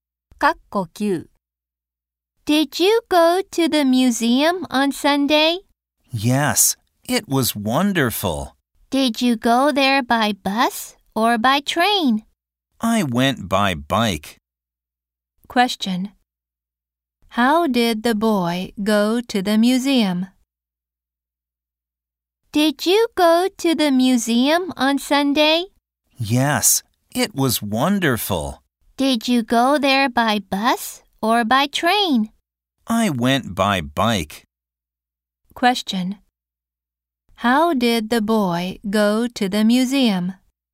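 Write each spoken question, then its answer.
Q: How did the boy go to the museum?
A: By bike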